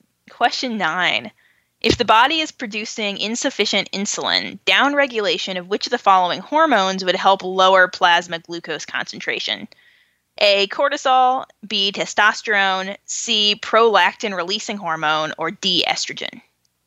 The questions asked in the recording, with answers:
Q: If the body is producing insufficient insulin, downregulation of which of the following hormones would help lower plasma glucose concentration?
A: So A is the answer.